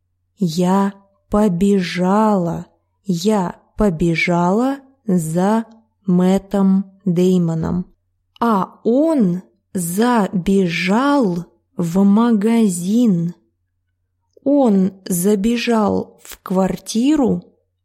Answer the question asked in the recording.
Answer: Нет, он забежал в магазин.